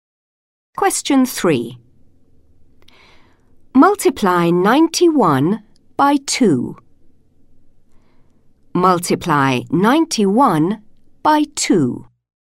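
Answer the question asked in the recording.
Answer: 182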